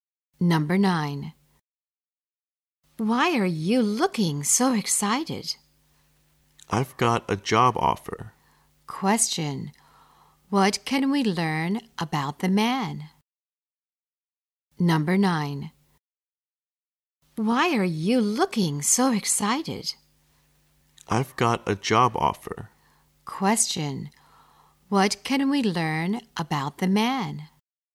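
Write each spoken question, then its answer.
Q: what can we learn about the man?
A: He has got a job offer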